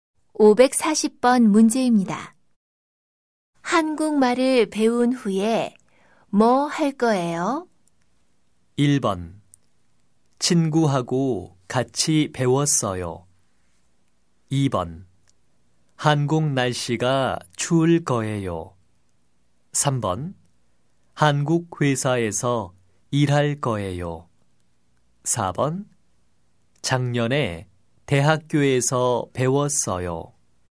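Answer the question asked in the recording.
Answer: 3: 한국 회사에서 일할 거예요.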